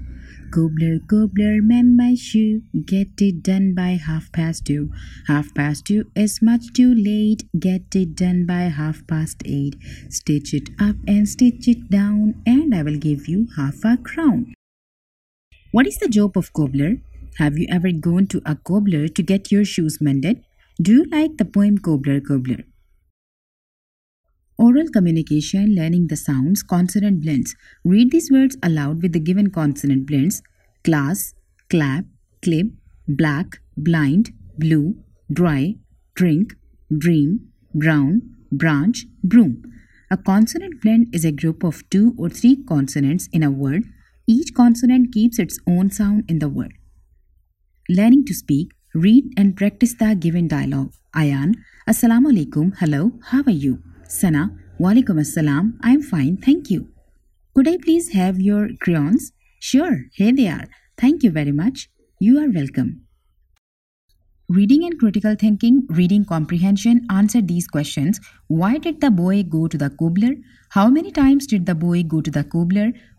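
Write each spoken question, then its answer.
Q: What is the job of cobbler?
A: To mend (repair) shoes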